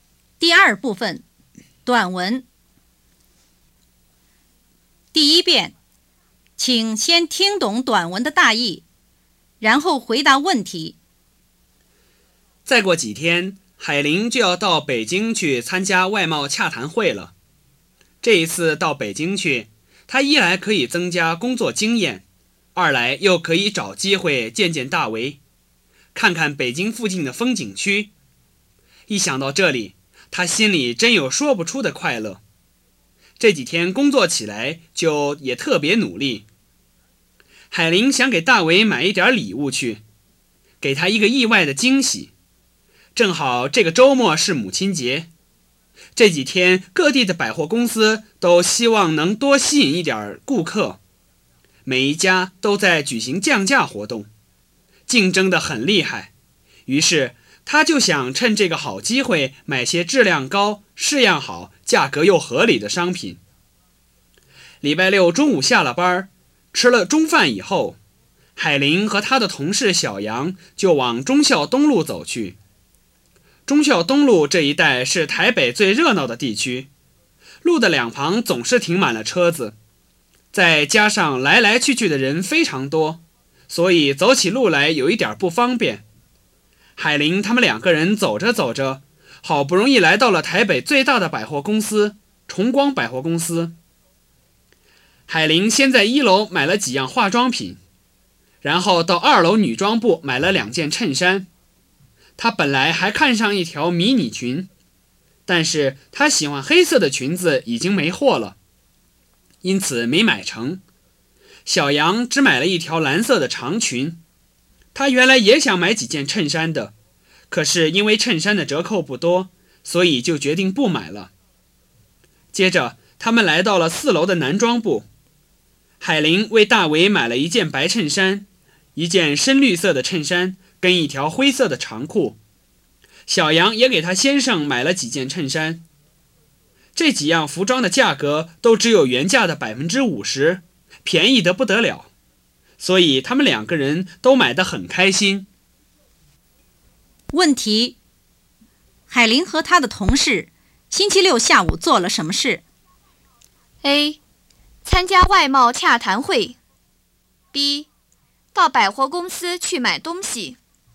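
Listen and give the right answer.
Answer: B: 到百货公司去买东西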